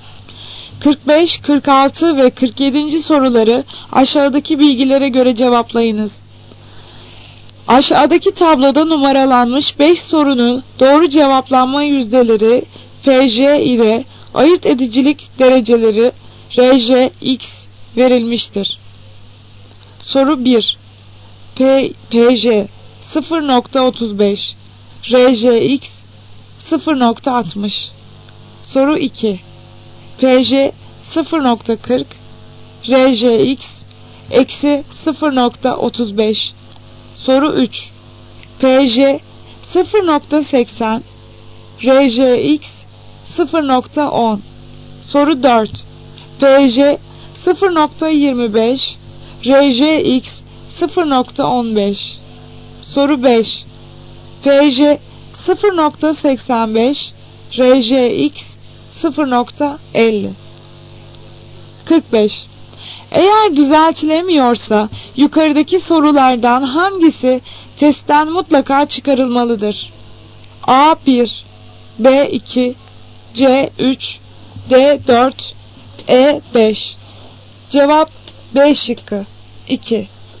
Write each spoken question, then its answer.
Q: Eğer düzeltilemiyorsa yukarıdaki sorulardan hangisi testten mutlaka çıkarılmalıdır?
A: Cevap B şıkkı 2.